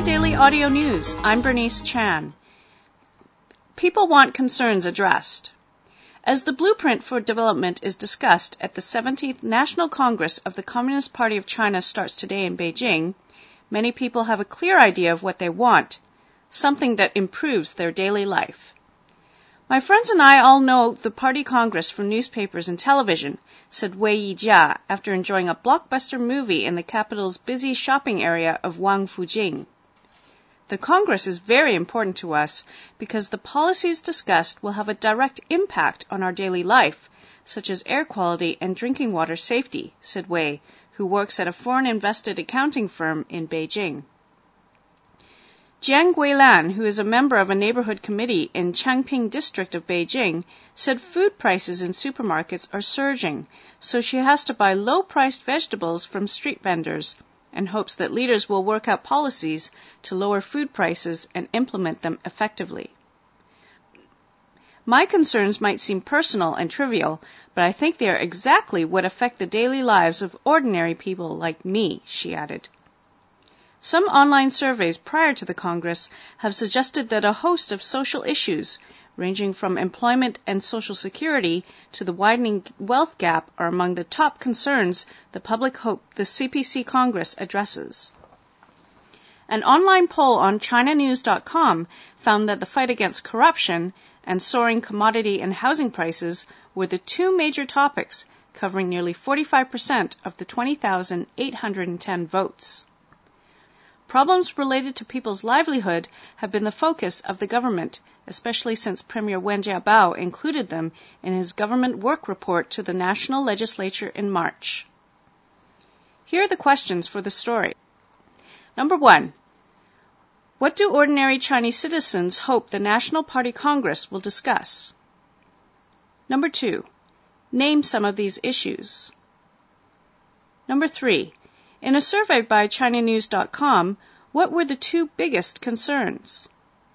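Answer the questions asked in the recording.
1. Issues that affect their daily lives
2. Air quality, drinking water safety, food prices, employment, social security, the wealth gap
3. Fighting corruption and soaring commodity and housing prices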